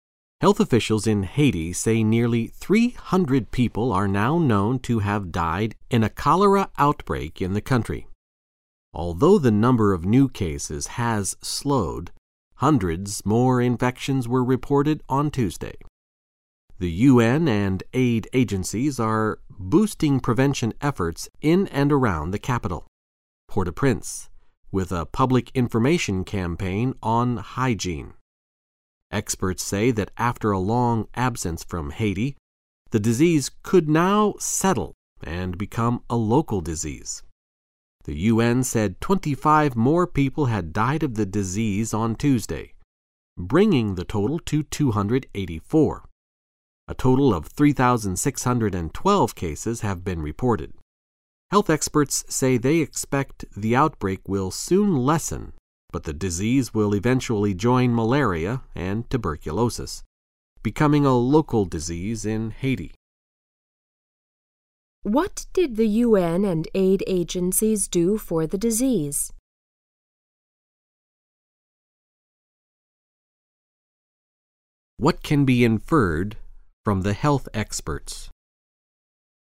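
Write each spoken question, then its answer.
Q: What did the UN and aid agencies do for the disease?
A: They boosted prevention efforts with a public information campaign on hygiene.

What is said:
[听力原文] Health officials in Haiti say nearly 300 people are now known to have died in a cholera outbreak in the country. Although the number of new cases has slowed, hundreds more infections were reported on Tuesday. The UN and aid agencies are boosting prevention efforts in and around the capital, Port-au-Prince, with a public information campaign on hygiene. Experts say that after a long absence from Haiti, the disease could now "settle" and become a local disease. The UN said 25 more people had died of the disease on Tuesday, bringing the total to 284. A total of 3612 cases have been reported. Health experts say they expect the outbreak will soon lessen but the disease will eventually join malaria and tuberculosis, becoming a local disease in Haiti.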